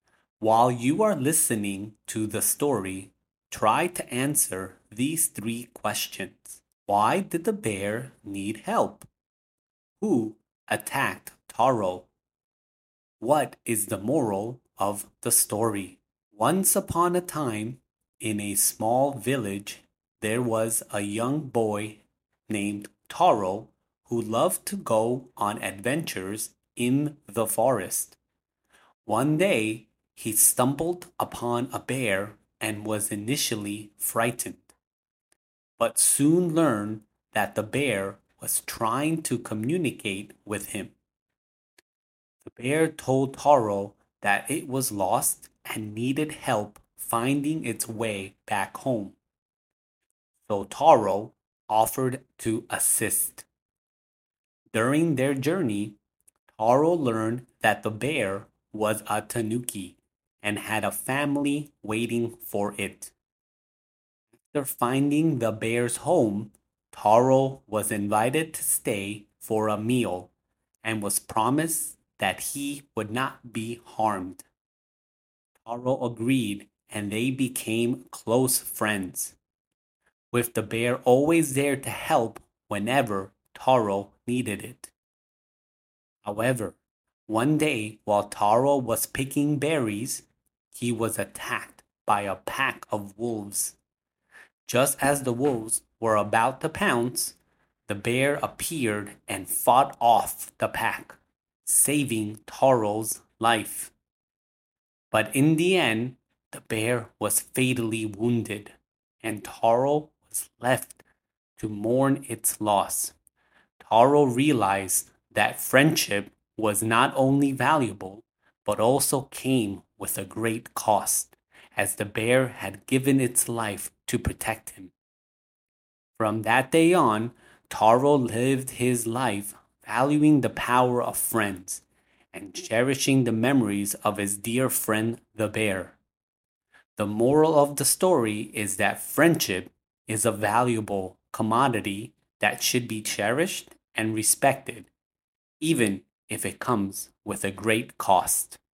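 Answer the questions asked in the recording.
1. It was lost and needed help finding its way back home.
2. A pack of wolves.
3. Friendship is valuable and should be cherished and respected, even if it comes with a great cost.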